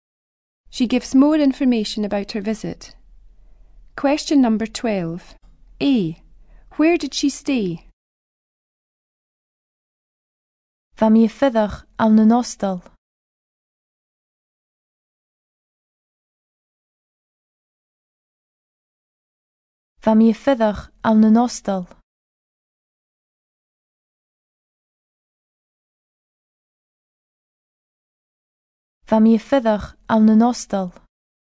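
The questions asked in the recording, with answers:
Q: Where did she stay?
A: In a hostel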